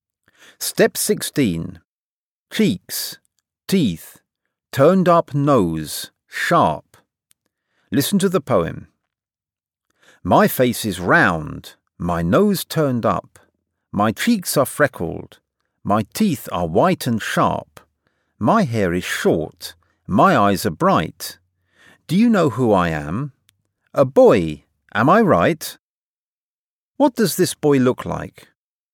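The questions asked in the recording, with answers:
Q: What does this boy look like?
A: Round face, turned-up nose, freckled cheeks, white sharp teeth, short hair, bright eyes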